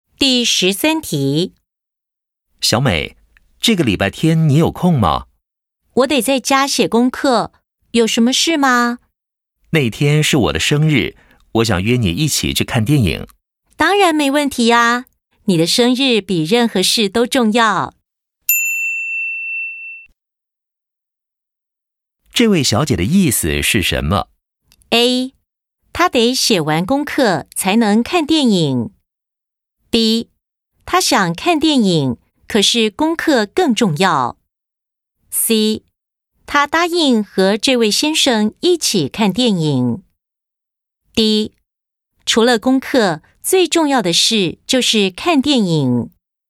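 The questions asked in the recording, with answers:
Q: 这位小姐的意思是什么?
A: C: 她答应和这位先生一起看电影。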